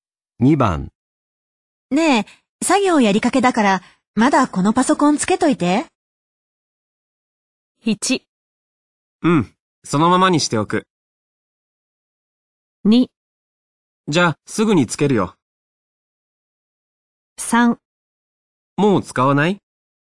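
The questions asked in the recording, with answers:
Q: ねえ、作業やりかけだから、まだこのパソコンつけといて。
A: 1: うん、そのままにしておく。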